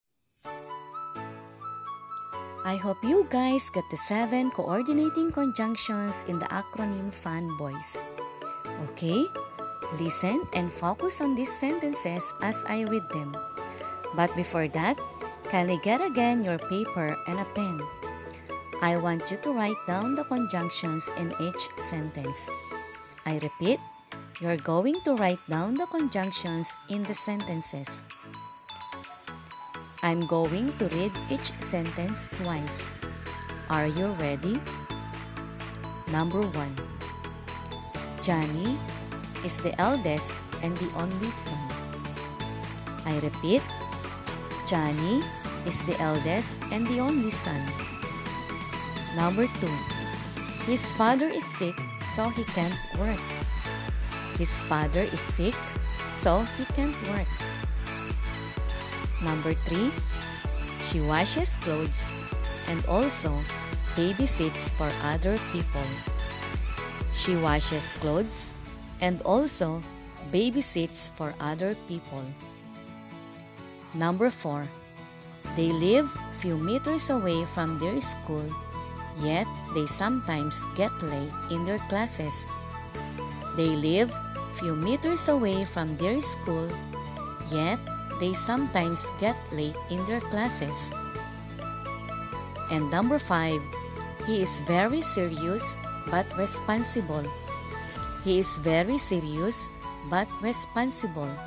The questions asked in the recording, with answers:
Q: Johnny is the eldest and the only son.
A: Number 1, and.

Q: His father is sick, so he can't work.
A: Number 2, so.

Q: she washes clothes and also babysits for other people.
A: Number 3, and,

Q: they live few meters away from their school, yet they sometimes get late in their classes.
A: number 4, yet,

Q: he is very serious but responsible.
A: and number 5, but.